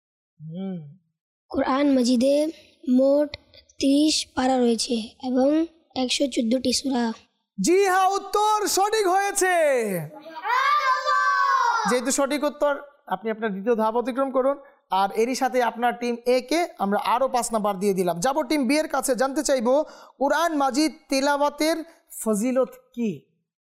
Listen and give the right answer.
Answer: অর্থাৎ এক হরফের বিনিময়ে 10 নেকি।